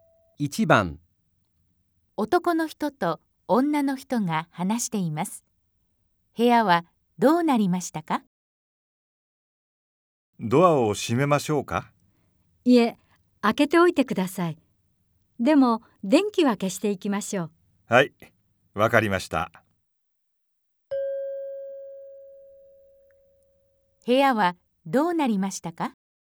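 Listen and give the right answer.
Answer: ドアは開いていて、電気は消えている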